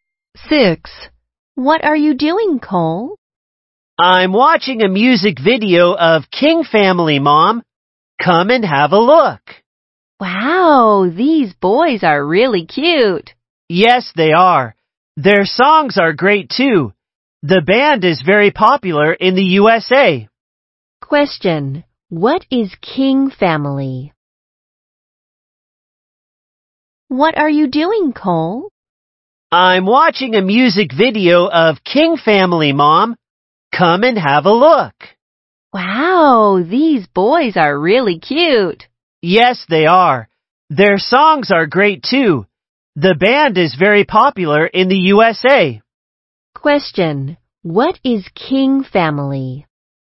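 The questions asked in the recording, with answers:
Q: What is King Family?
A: A band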